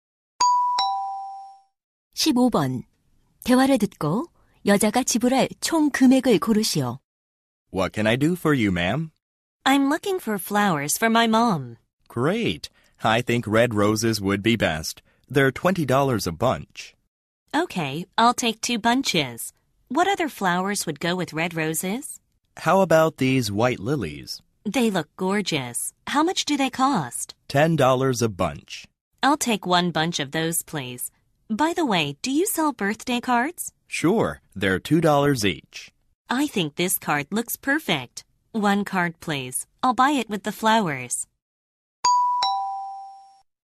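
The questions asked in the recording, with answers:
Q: 대화를 듣고 여자가 지불할 총 금액을 고르시오.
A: $52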